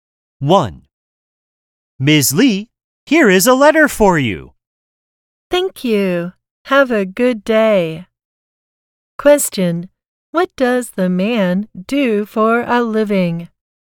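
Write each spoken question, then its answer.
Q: What does the man do for a living?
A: He is a mail carrier (mailman).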